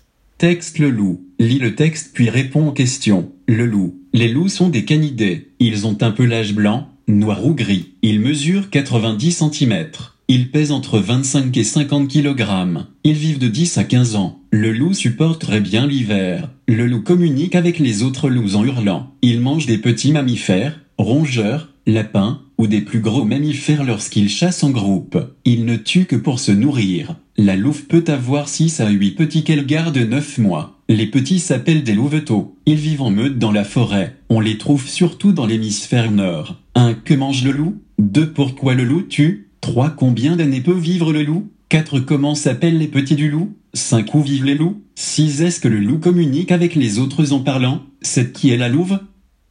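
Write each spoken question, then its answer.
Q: Que mange le loup?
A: Des petits mammifères, rongeurs, lapins, ou de plus gros mammifères en groupe

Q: Pourquoi le loup tue?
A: Pour se nourrir

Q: Combien d'années peut vivre le loup?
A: De 10 à 15 ans

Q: Comment s'appellent les petits du loup?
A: Des louveteaux

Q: Où vivent les loups?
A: En meute dans la forêt, surtout dans l'hémisphère nord

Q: Est-ce que le loup communique avec les autres en parlant?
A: Non, en hurlant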